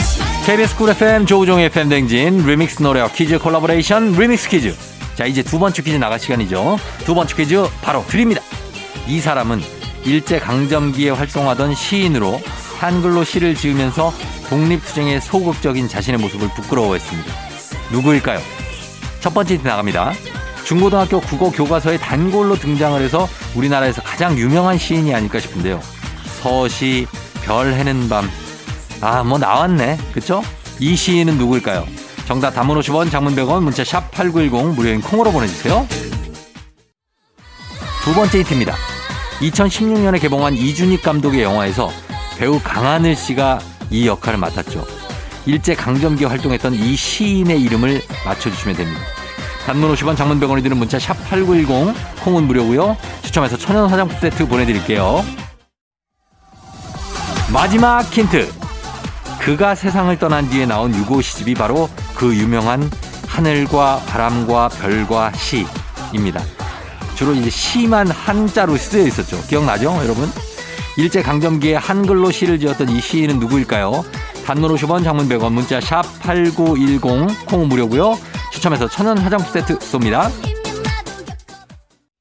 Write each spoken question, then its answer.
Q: 일제 강점기에 한글로 시를 지었던 이 시인은 누구일까요?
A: 정답은 바로 두구두구두구두구두구두구두구두구 윤동주입니다.